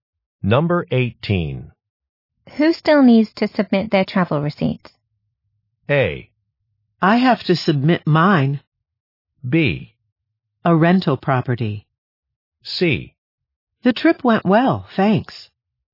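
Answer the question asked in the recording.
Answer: A: I have to submit mine.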